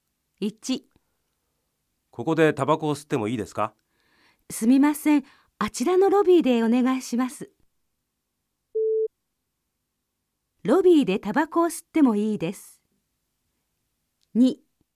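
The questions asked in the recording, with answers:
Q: ロビーでタバコを吸ってもいいです。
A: 正しい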